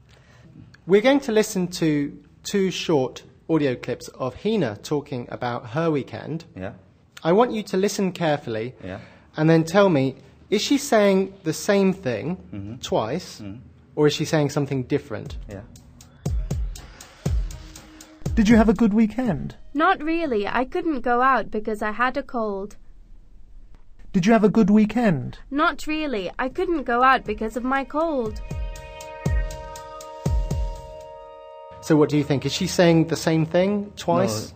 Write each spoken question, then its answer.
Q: Is she saying the same thing twice?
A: You're right to say that the grammar was slightly different, although the meaning was the same.